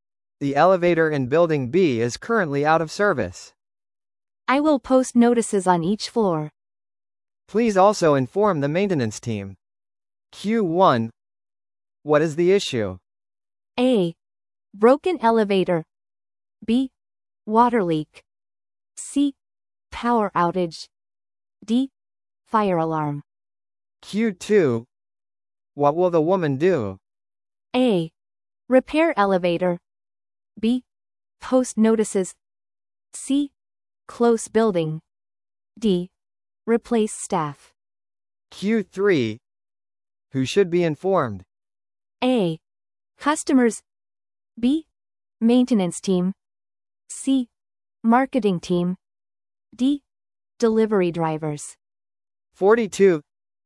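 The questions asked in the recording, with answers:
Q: What is the issue?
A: A: Broken elevator.

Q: What will the woman do?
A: B: Post notices.

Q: Who should be informed?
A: B: Maintenance team.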